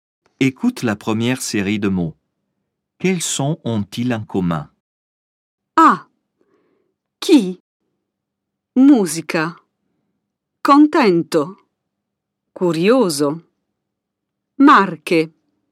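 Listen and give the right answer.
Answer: le son [k] (« que »)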